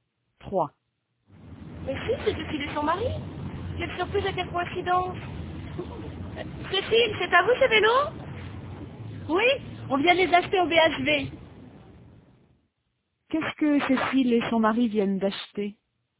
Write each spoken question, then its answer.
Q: Qu'est-ce que Cécile et son mari viennent d'acheter?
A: Des vélos.